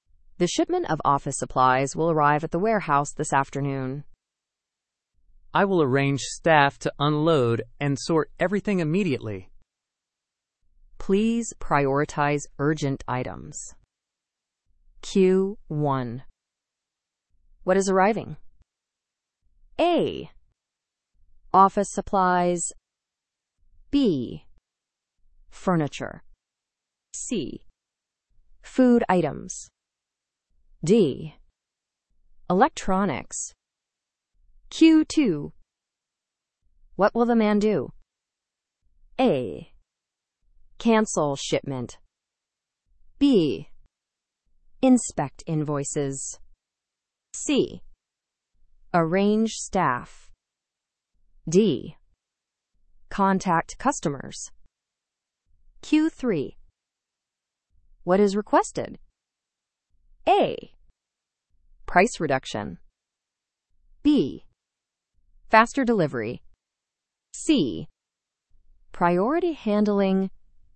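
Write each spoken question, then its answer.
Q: What is arriving?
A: A: Office supplies.

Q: What will the man do?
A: C: Arrange staff.

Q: What is requested?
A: C: Priority handling.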